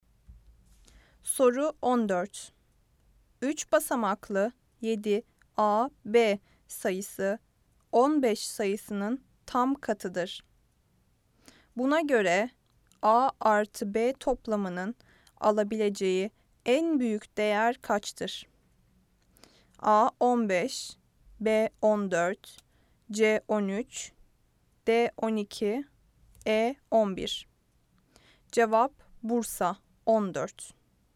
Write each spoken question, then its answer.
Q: Buna göre A artı B toplamının alabileceği en büyük değer kaçtır?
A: Cevap Bursa 14.